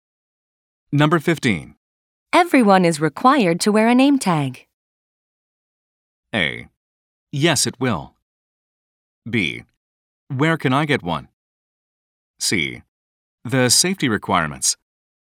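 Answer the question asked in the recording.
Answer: B: Where can I get one?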